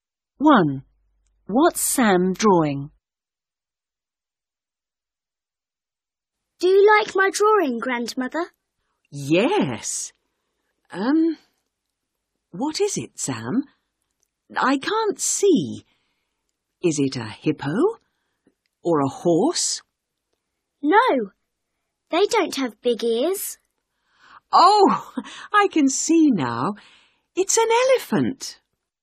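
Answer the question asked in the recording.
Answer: an elephant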